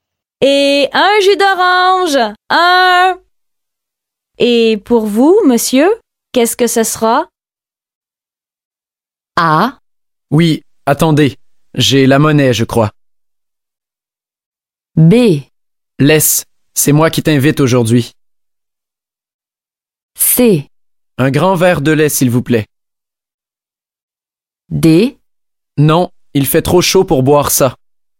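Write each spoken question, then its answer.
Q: Et pour vous, monsieur, qu'est-ce que ce sera ?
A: C: Un grand verre de lait, s'il vous plaît.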